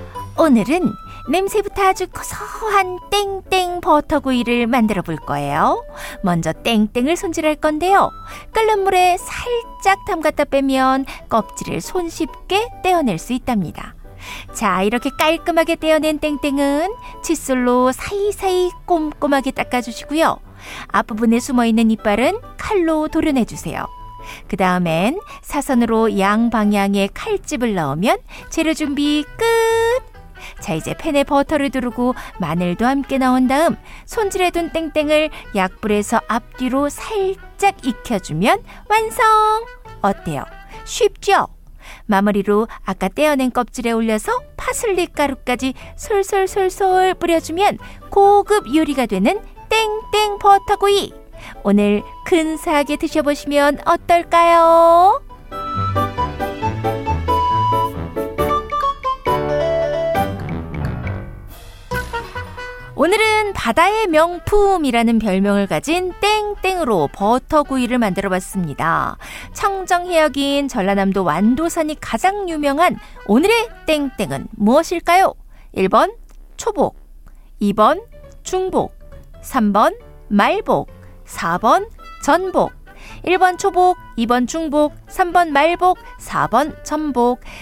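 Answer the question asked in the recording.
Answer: 4번: 전복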